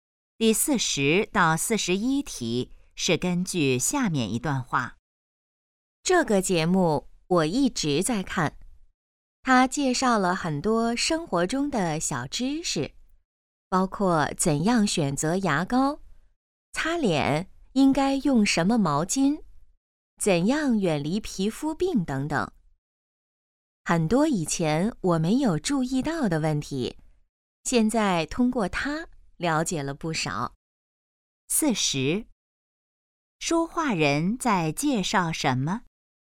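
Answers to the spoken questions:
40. 一个电视节目
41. 生活中的小知识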